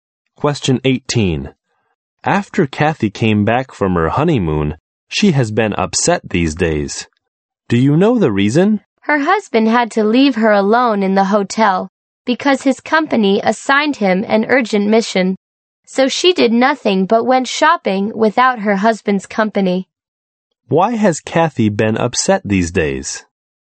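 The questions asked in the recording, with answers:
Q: Why has Kathy been upset these days?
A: Her husband left her alone at the hotel on their honeymoon for an urgent work mission.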